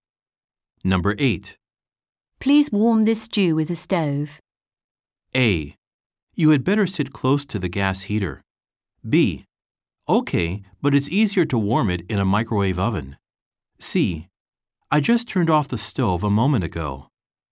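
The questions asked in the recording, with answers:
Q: Please warm this stew with a stove.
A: B: Okay, but it's easier to warm it in a microwave oven.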